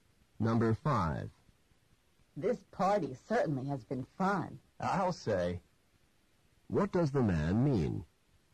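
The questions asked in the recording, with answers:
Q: What does the man mean?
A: He agrees the party has been fun.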